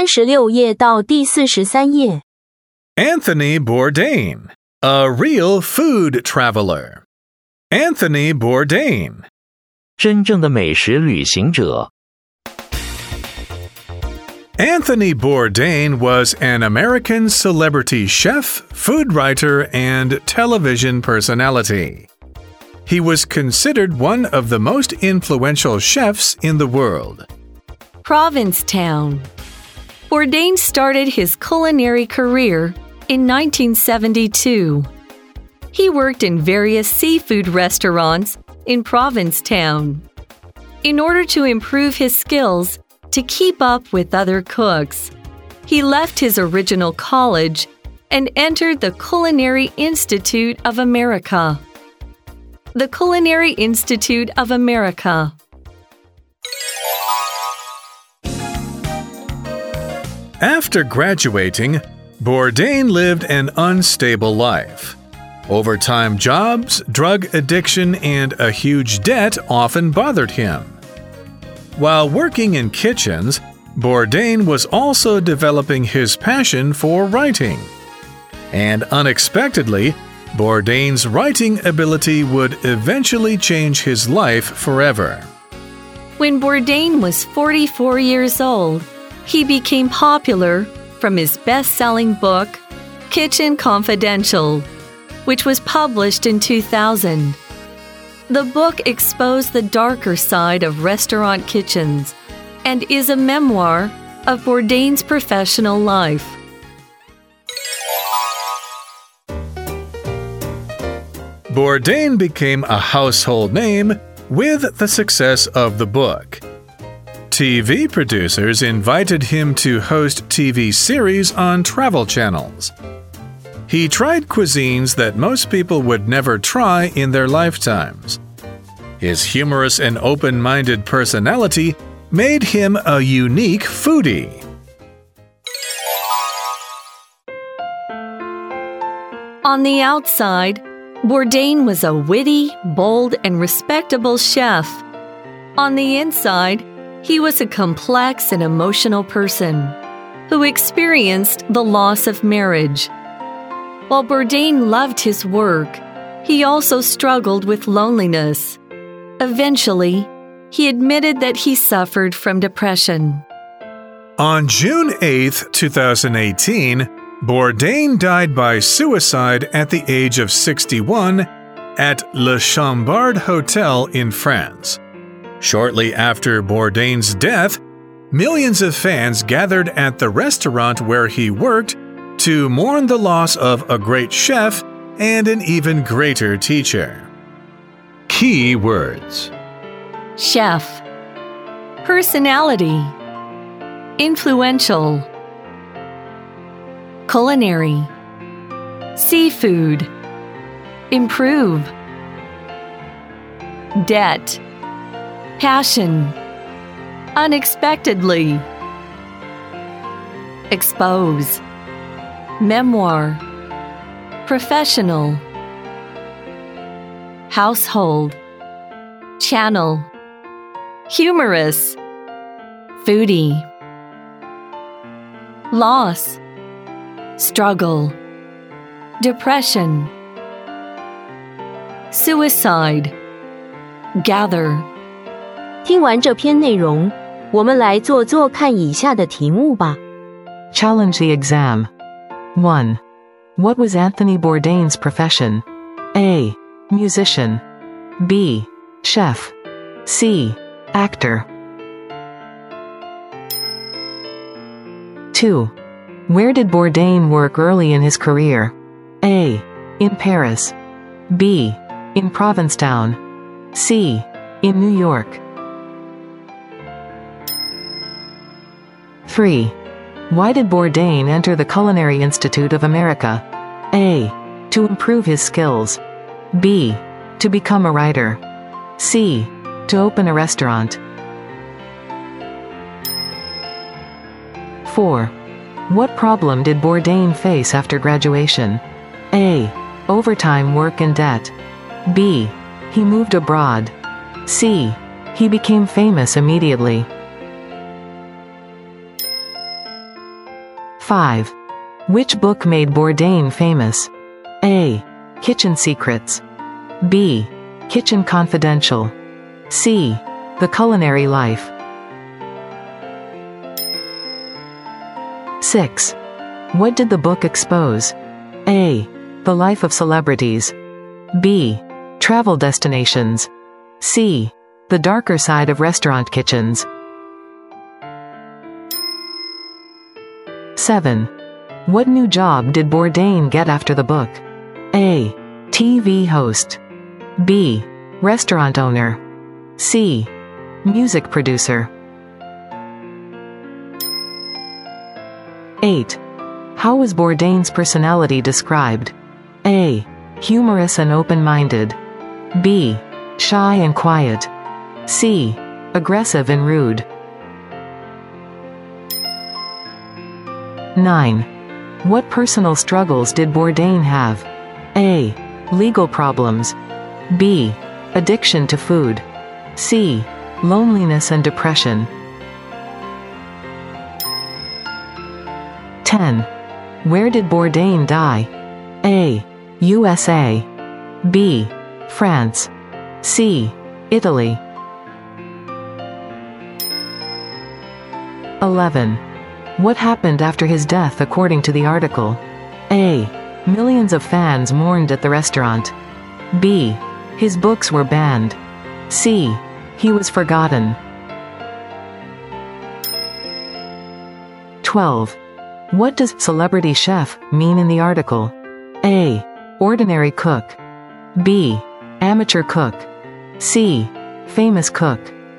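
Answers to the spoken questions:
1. B: Chef.
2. B: In Provincetown.
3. A: To improve his skills.
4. A: Overtime work and debt.
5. B: Kitchen Confidential.
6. C: The darker side of restaurant kitchens.
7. A: TV host.
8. A: Humorous and open-minded.
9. C: Loneliness and depression.
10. B: France.
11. A: Millions of fans mourned at the restaurant.
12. C: Famous cook.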